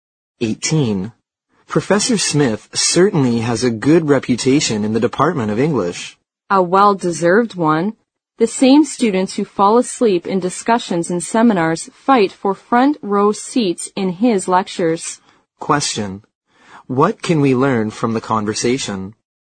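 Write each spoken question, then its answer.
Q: What can we learn from the conversation?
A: Professor Smith's lectures are very popular with students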